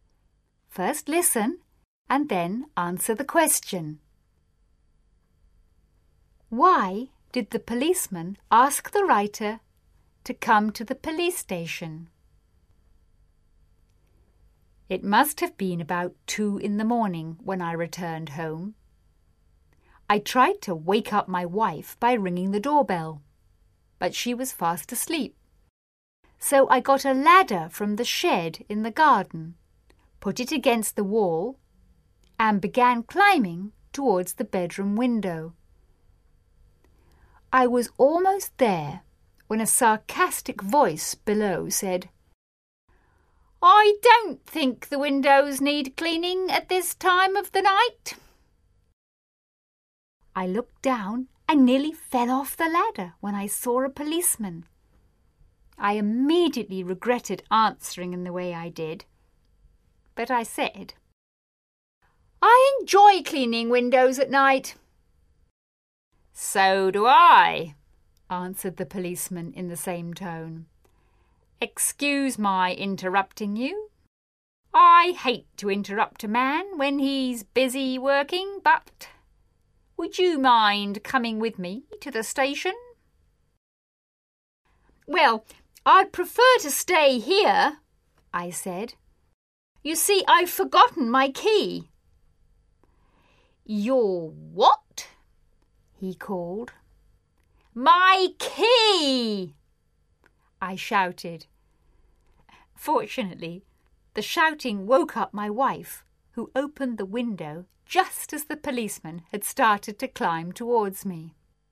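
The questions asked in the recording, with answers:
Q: Why did the policeman ask the writer to come to the police station?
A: Because he saw him climbing a ladder to a window at 2 a.m. and thought he was a burglar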